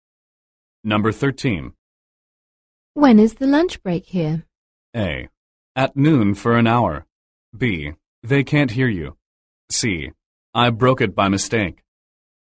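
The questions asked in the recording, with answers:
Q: When is the lunch break here?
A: A: At noon for an hour.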